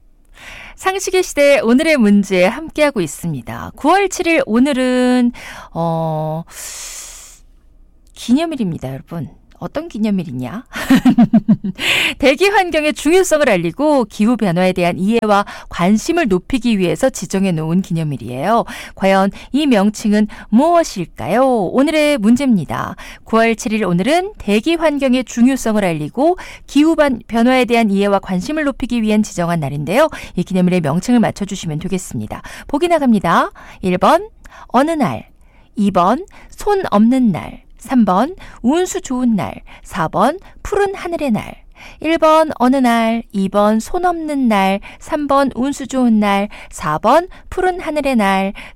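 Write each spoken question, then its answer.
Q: 이 기념일의 명칭을 맞춰주시면 되겠습니다.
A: 4번: 푸른 하늘의 날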